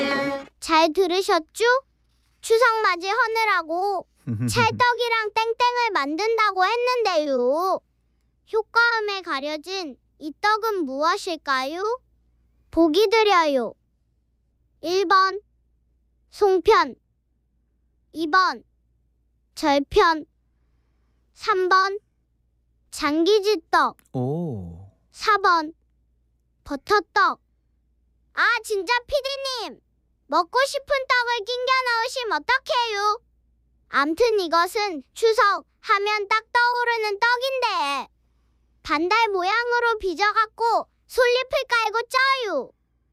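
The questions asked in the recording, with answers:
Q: 효과음에 가려진 이 떡은 무엇일까요?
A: 1번: 송편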